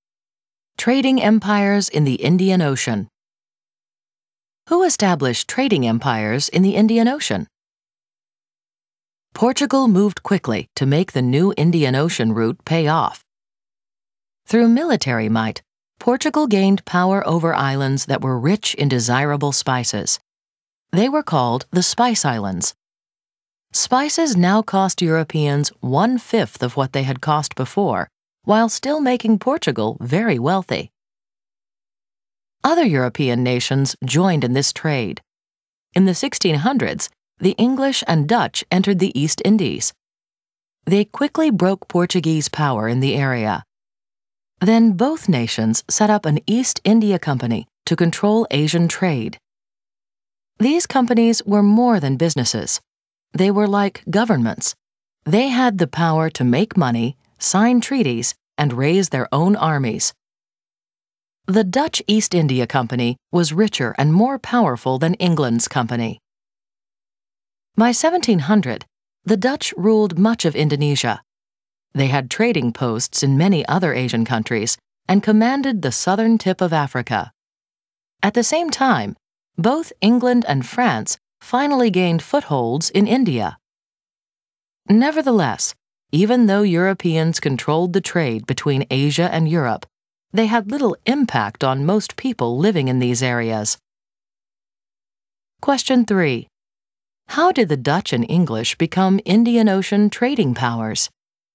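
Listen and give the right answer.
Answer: They broke Portuguese power in the East Indies and set up East India Companies to control Asian trade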